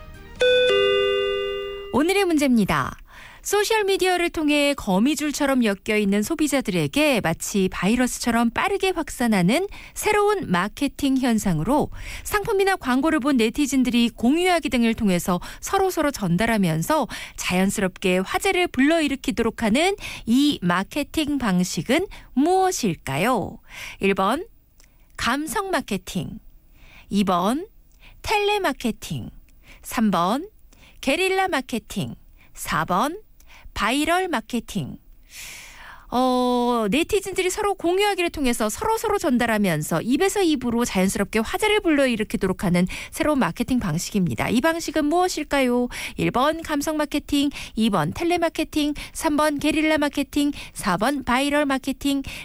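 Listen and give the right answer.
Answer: 4: 바이럴 마케팅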